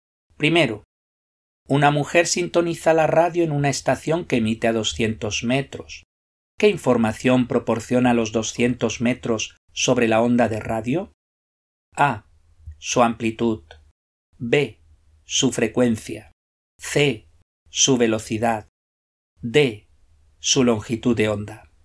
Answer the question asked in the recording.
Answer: La respuesta correcta es la D.